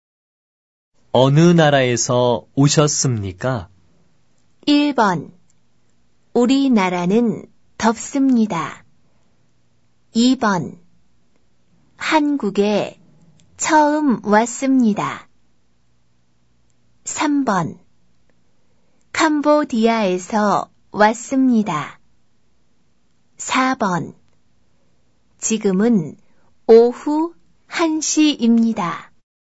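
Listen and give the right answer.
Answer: 3: 캄보디아에서 왔습니다.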